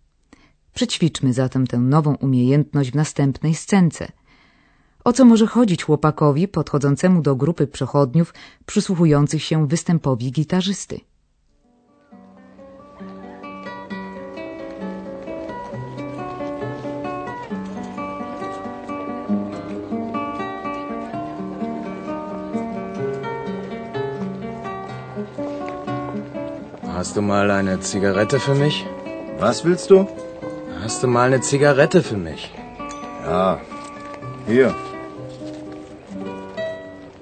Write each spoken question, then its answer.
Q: O co może chodzić chłopakowi podchodzącemu do grupy przechodniów przysłuchujących się występowi gitarzysty?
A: Chłopak wyraźnie pragnie zapalić papierosa.